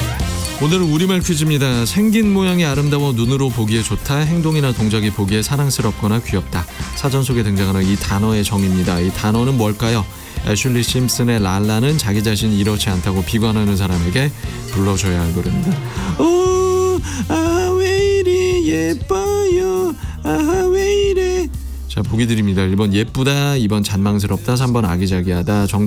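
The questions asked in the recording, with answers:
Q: 이 단어는 뭘까요?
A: 1: 예쁘다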